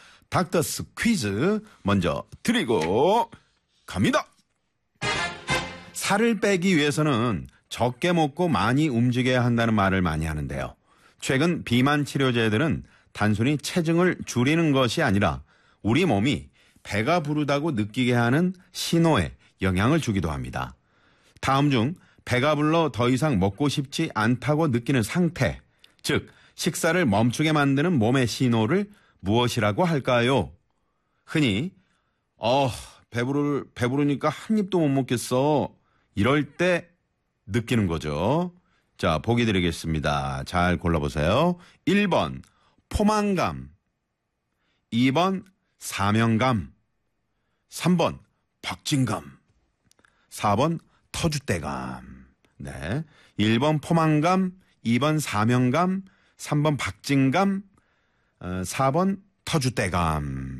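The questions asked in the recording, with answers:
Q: 다음 중 배가 불러 더 이상 먹고 싶지 않다고 느끼는 상태, 즉 식사를 멈추게 만드는 몸의 신호를 무엇이라고 할까요?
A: 1: 포만감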